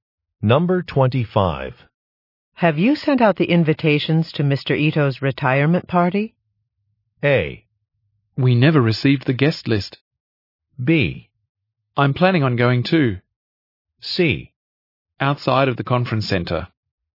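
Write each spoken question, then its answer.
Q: Have you sent out the invitations to Mr. Ito's retirement party?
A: A: We never received the guest list.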